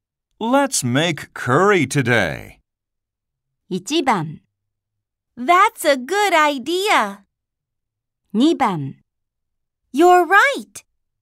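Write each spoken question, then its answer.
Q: Let's make curry today.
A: 1: That's a good idea.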